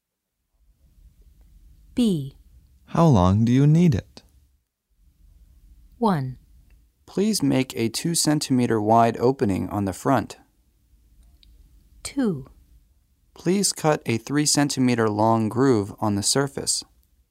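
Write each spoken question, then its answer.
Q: How long do you need it?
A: 2: Please cut a 3 centimeter long groove on the surface.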